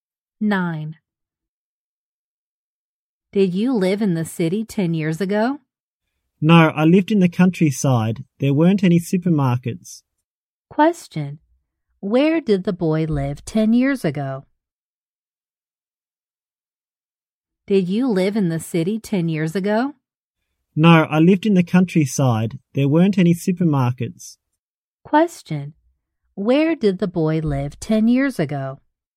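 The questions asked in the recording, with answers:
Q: Where did the boy live 10 years ago?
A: In the countryside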